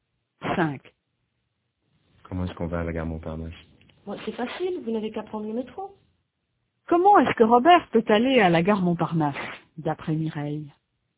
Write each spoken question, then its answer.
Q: Comment est-ce que Robert peut aller à la gare Montparnasse, d'après Mireille?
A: En métro.